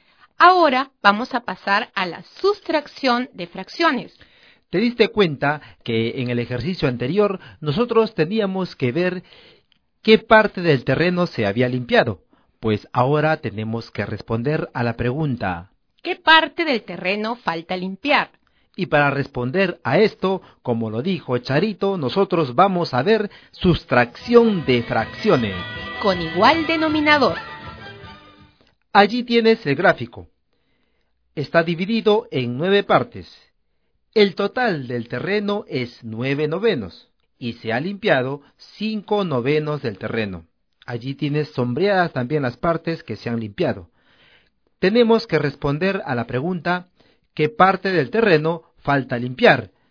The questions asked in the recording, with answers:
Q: ¿qué parte del terreno falta limpiar?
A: Faltan limpiar 4 novenos del total del terreno.